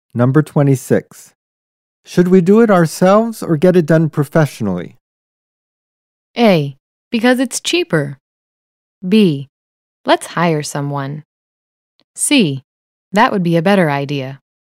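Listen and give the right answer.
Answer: B: Let's hire someone.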